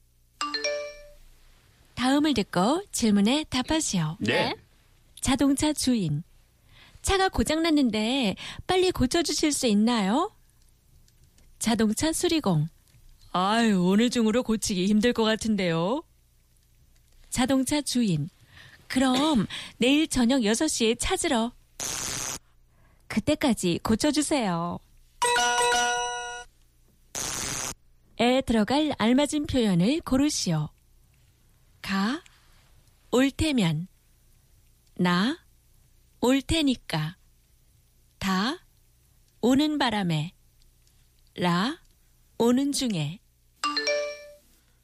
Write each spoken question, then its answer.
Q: 에 들어갈 알맞은 표현을 고르시오.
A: Na, 올 테니까, since I will come.